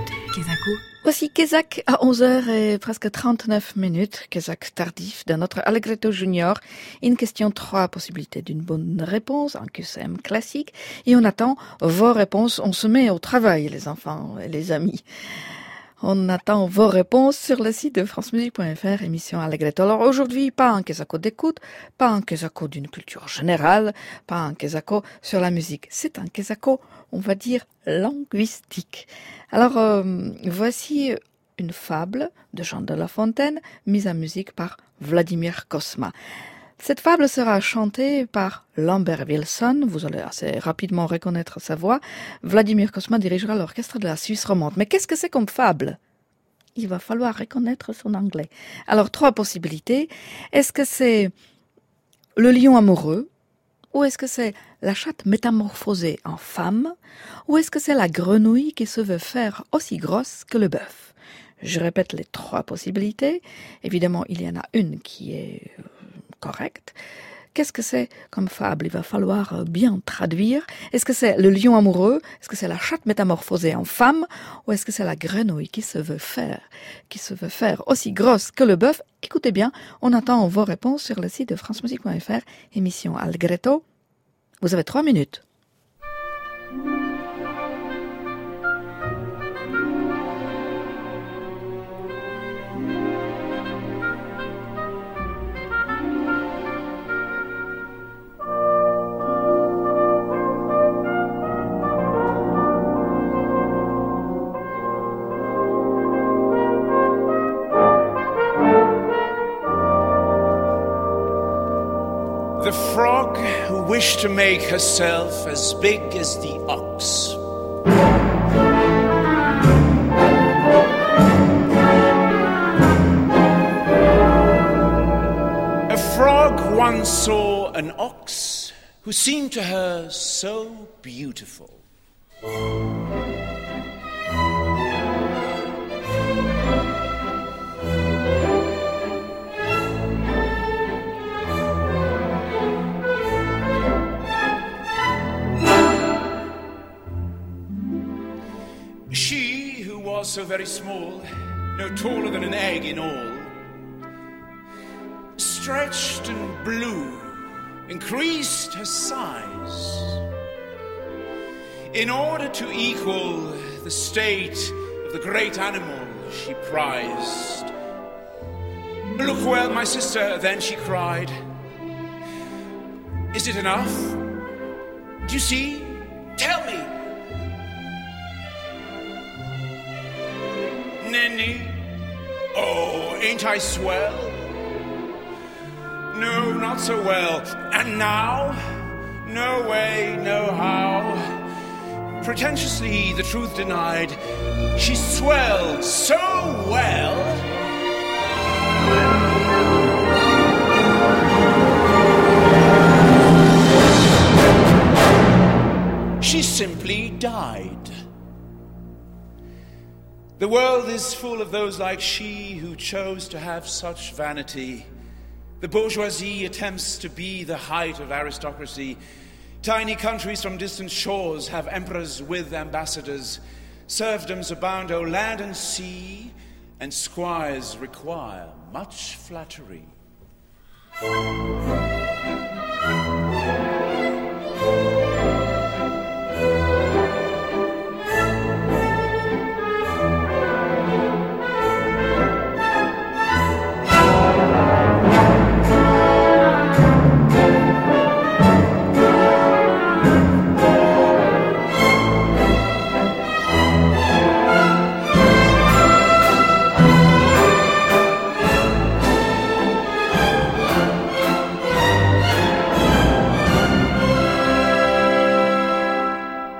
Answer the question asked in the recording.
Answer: C'était bien la grenouille.